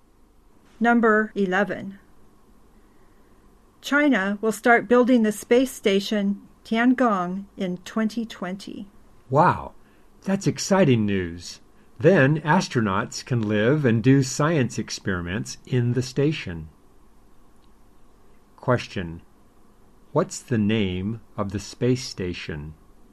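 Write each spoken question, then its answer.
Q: What's the name of the space station?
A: Tiangong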